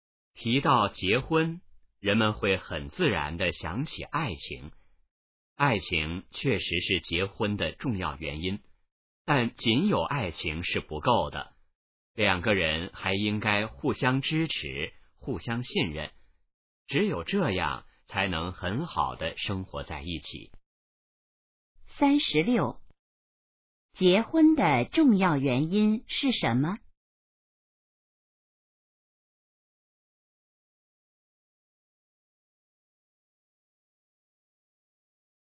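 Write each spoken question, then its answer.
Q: 结婚的重要原因是什么?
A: 爱情

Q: 两个人怎样才能很好的一起生活?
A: 互相支持,互相信任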